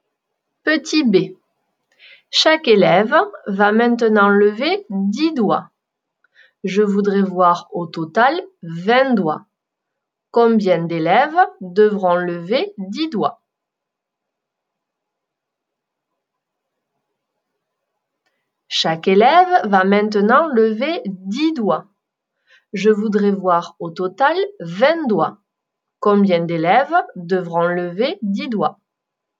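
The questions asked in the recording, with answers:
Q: Combien d'élèves devront lever 10 doigts?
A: 2 élèves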